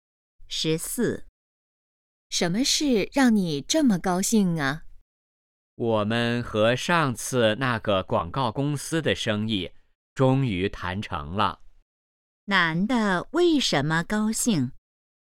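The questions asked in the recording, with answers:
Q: 男的为什么高兴?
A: 和广告公司的生意谈成了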